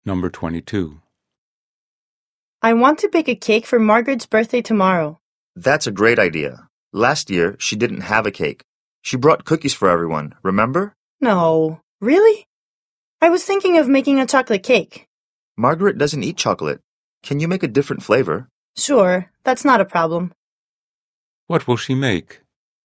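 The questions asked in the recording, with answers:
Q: What will she make?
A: A birthday cake for Margaret that isn't chocolate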